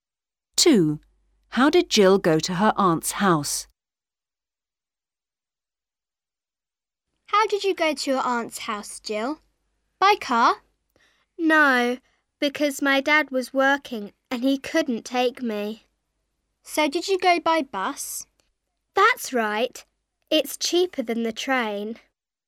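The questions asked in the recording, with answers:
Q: How did Jill go to her aunt's house?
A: By bus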